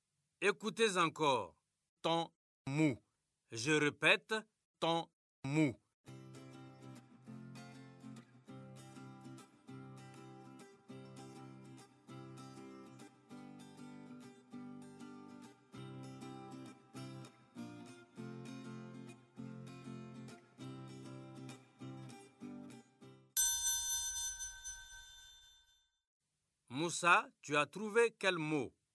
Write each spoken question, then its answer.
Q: Moussa, tu as trouvé quel mot?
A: Monsieur, c'est mouton.